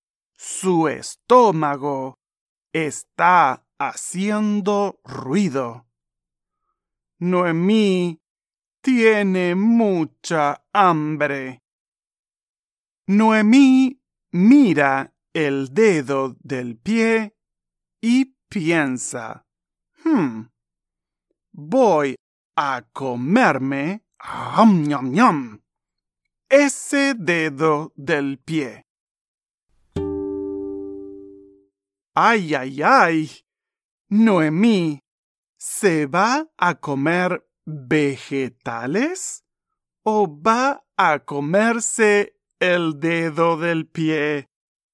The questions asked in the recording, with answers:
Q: Noemí ¿Se va a comer vegetales o va a comerse el dedo del pie?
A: Sí, guácala. Noemí piensa, voy a comerme ese dedo del pie.